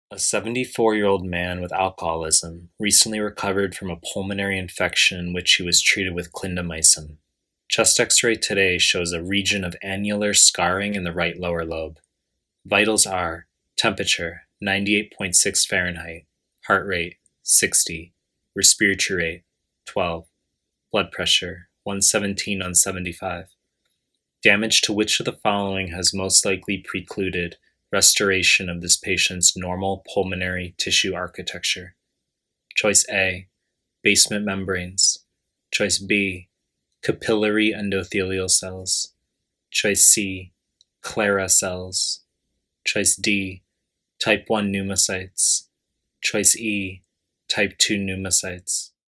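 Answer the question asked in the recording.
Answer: A: basement membranes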